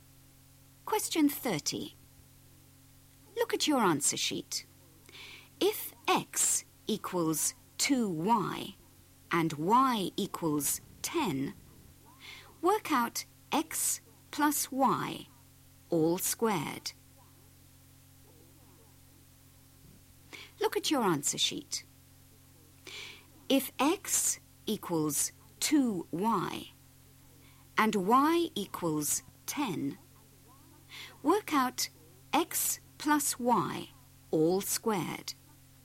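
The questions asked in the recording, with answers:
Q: If x equals 2y and y equals 10, work out x plus y all squared.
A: 900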